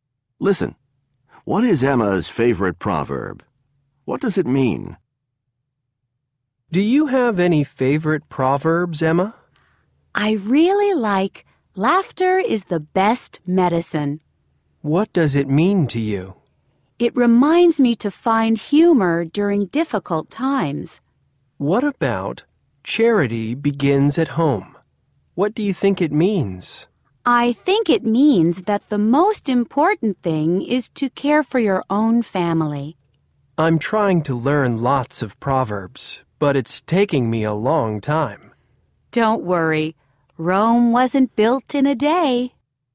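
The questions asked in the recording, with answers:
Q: What is Emma's favorite proverb?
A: Laughter is the best medicine.

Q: What does it mean?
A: It reminds her to find humor during difficult times.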